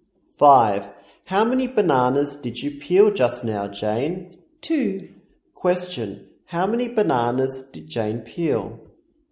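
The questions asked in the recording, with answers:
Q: How many bananas did Jane peel?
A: Two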